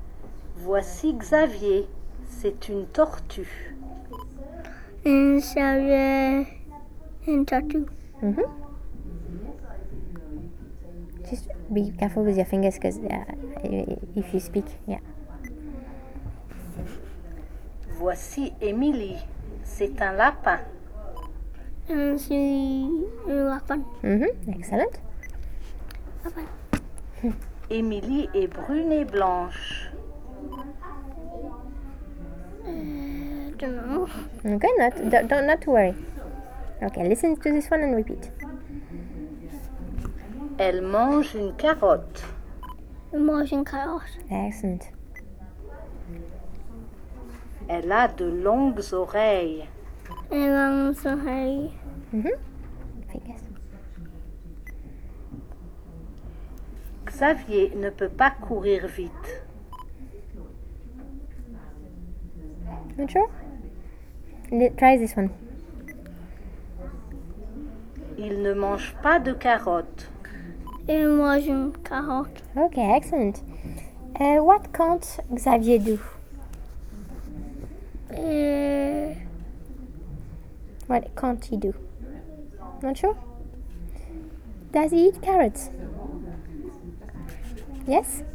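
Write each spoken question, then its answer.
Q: What can't Xavier do?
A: Run fast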